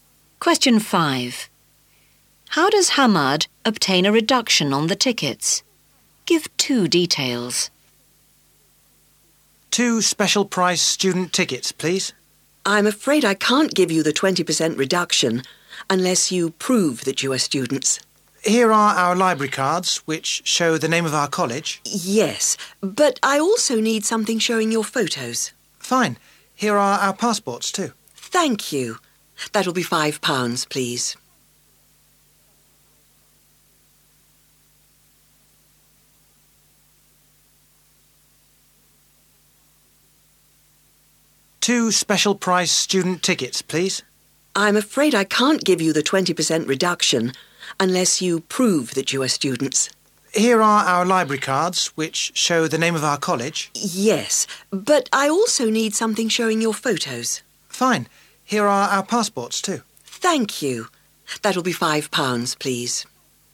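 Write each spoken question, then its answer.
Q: How does Hamad obtain a reduction on the tickets?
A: He shows library cards and passports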